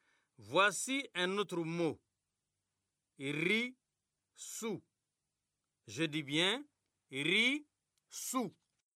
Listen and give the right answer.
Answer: C'est souris, monsieur.